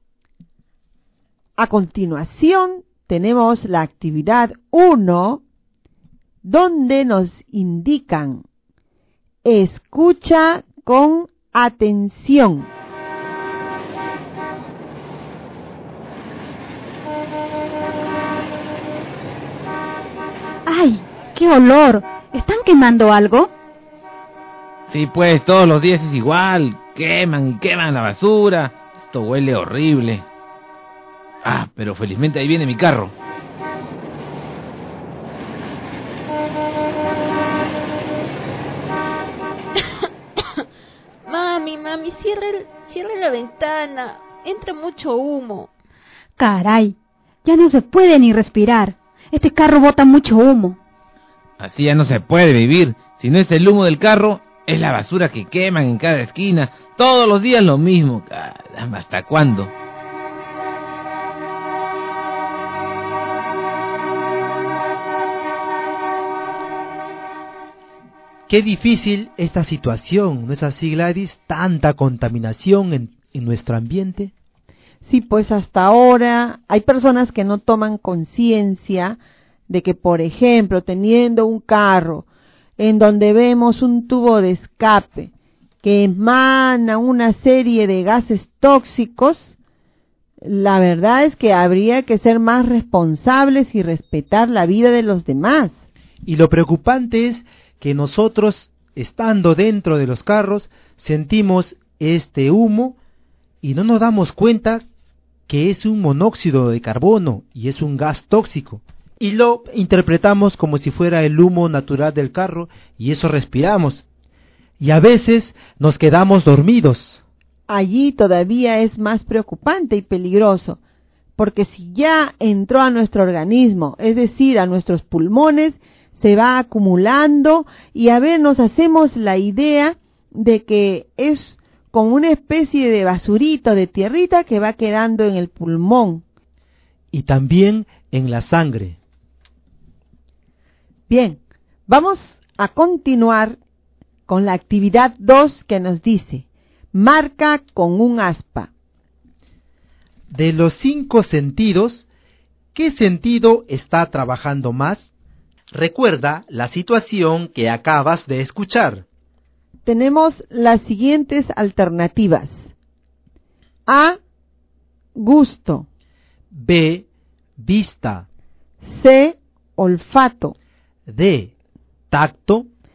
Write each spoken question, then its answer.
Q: De los 5 sentidos, ¿qué sentido está trabajando más?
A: Marqué la alternativa C. Olfato.